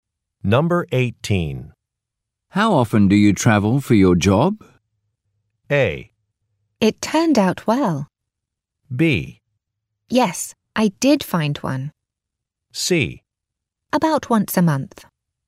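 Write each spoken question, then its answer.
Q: How often do you travel for your job?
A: C: About once a month.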